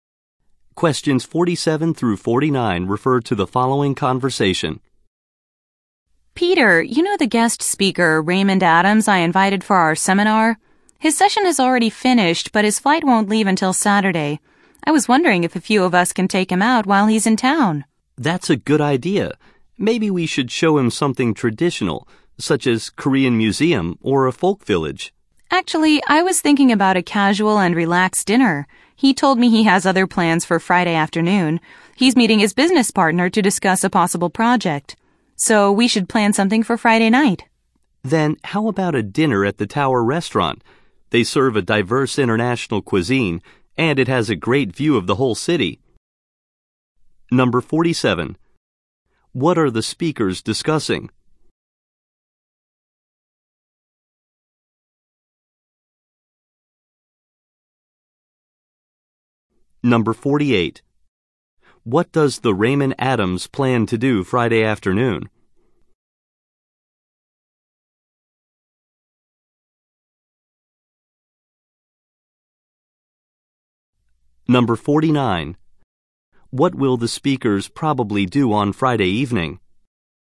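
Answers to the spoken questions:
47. Taking a guest speaker out while he is in town
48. Meet his business partner
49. Have dinner at the Tower Restaurant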